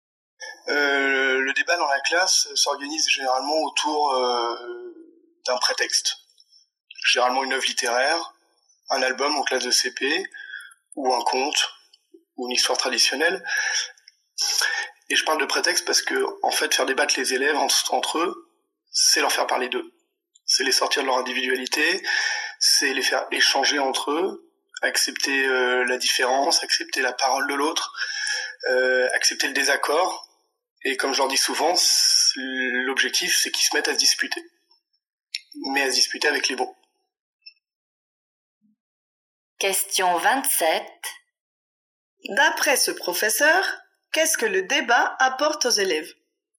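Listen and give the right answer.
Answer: Il leur apprend à parler d'eux, à sortir de leur individualité, à échanger entre eux et à accepter la différence et le désaccord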